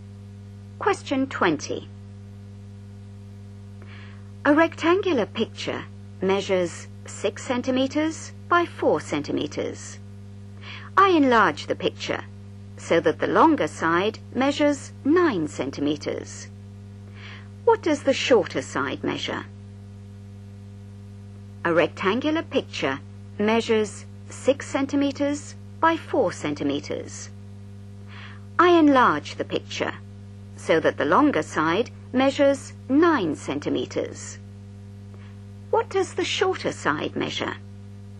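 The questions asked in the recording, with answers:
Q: What does the shorter side measure?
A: 6 cm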